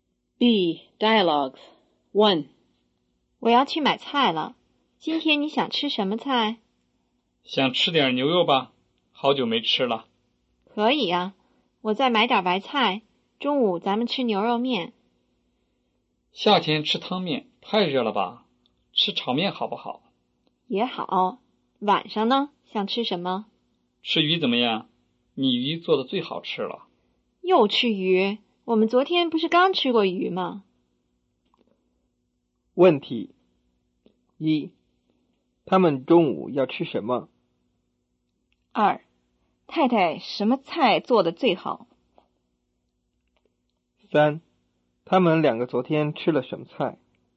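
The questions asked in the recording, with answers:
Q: 问题一,他们中午要吃什么?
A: 牛肉炒面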